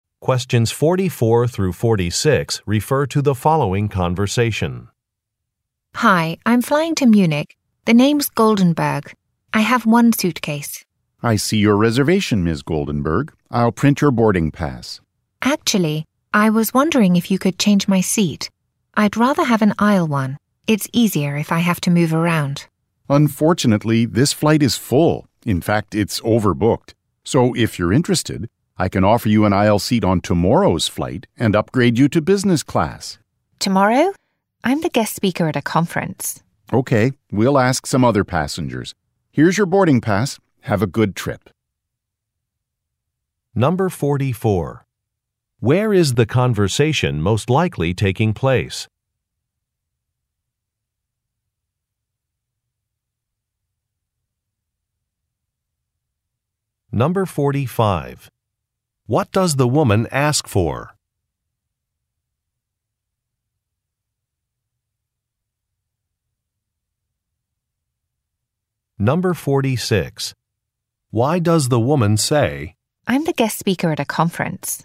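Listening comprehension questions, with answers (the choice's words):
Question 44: Where is the conversation most likely taking place?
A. At a bus terminal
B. At an airport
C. In a hotel lobby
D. In a conference hall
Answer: At an airport

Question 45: What does the woman ask for?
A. A different seat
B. A name badge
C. A room upgrade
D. A special menu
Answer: A different seat

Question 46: Why does the woman say, "I'm the guest speaker at a conference"?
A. To confirm her conference attendance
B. To introduce herself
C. To refuse an offer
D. To clarify a misunderstanding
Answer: To refuse an offer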